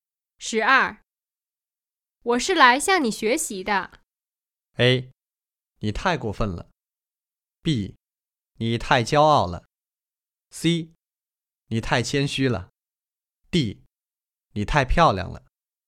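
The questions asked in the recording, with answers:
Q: 我是来向你学习的。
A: C: 你太谦虚了。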